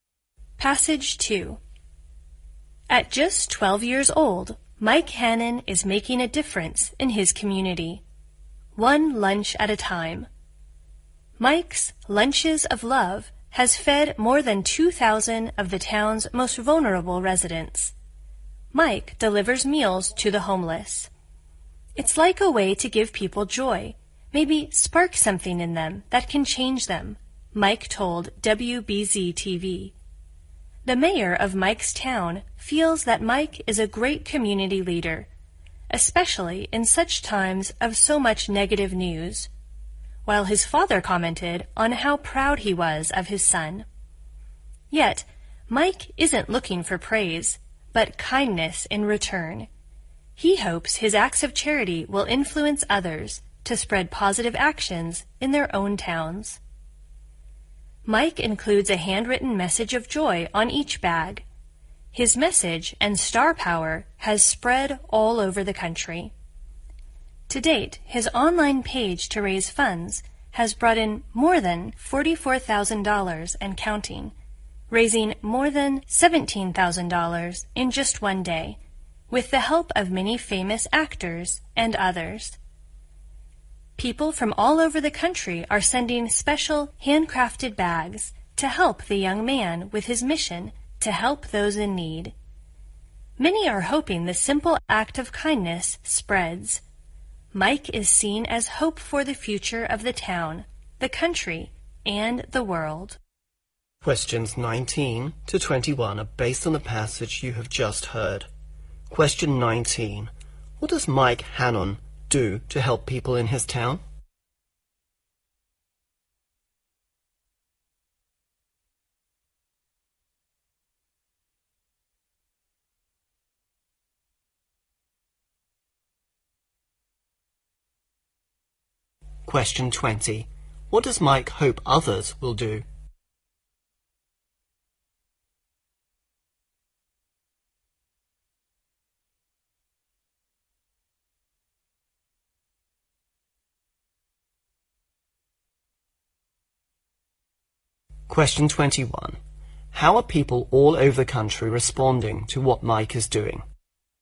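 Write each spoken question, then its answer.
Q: What does Mike Hannon do to help people in his town?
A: Delivers lunches to the homeless

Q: What does Mike hope others will do?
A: Spread positive actions in their own towns

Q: How are people all over the country responding to what Mike is doing?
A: Sending handcrafted bags and donating money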